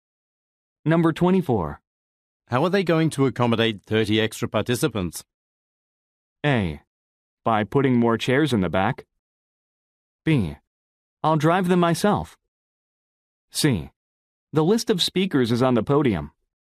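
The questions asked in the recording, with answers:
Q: How are they going to accommodate 30 extra participants?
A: A: By putting more chairs in the back.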